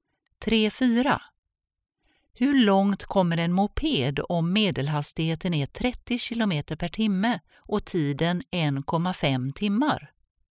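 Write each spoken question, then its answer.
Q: Hur långt kommer en moped om medelhastigheten är 30 km per timme och tiden 1,5 timmar?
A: 45 km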